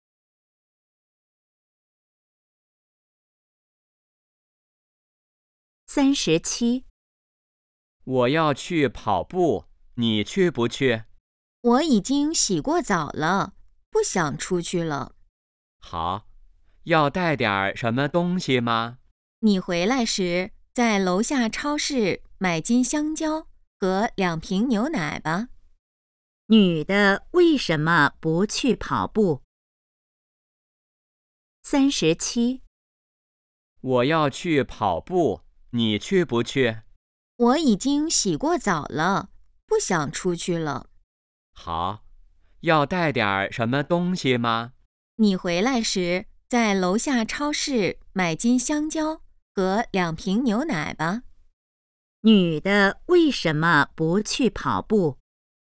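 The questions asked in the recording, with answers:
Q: 女的为什么不去跑步?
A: 已经洗过澡了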